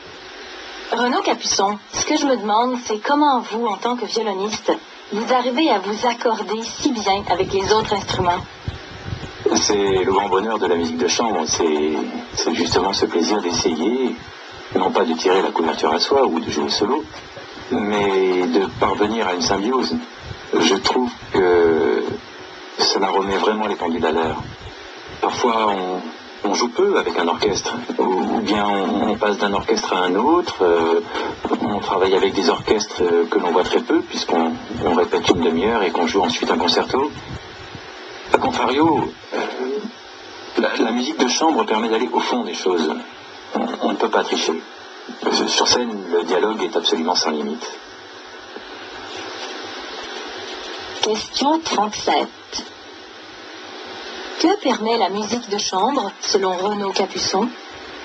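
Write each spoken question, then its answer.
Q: Que permet la musique de chambre, selon Renaud Capuçon ?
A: D'aller au fond des choses, en parvenant à une symbiose avec les autres musiciens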